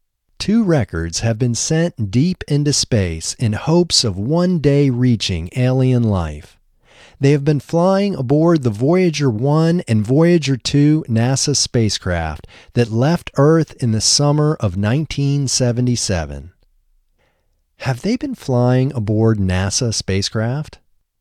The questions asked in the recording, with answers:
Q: Have they been flying aboard NASA spacecraft?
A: Yes, they have been flying aboard NASA spacecraft.